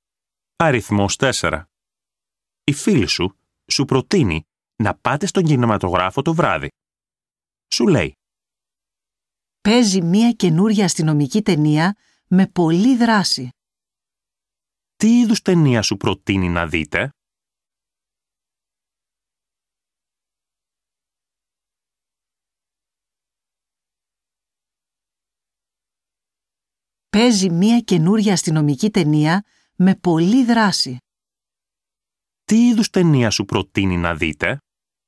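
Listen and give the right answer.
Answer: αστυνομική ταινία με πολλή δράση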